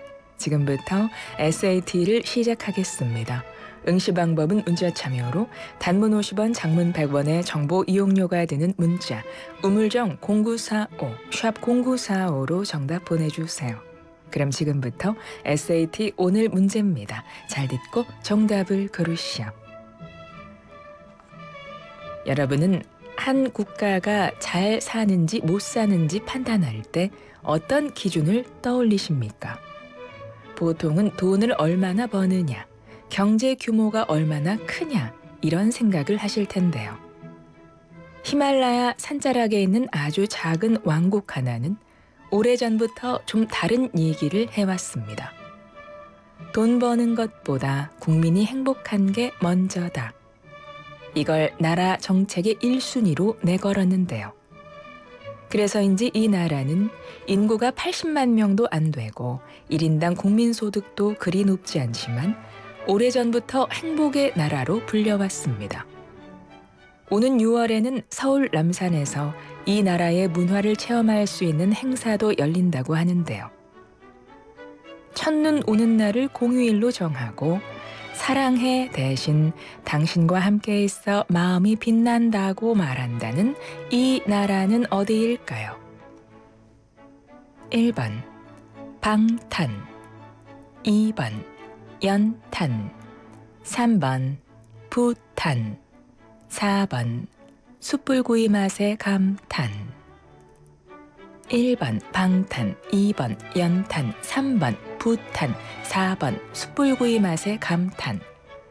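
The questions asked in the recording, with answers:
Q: 첫눈 오는 날을 공휴일로 정하고 사랑해 대신 당신과 함께 있어 마음이 빛난다고 말한다는 이 나라는 어디일까요?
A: 3: 부탄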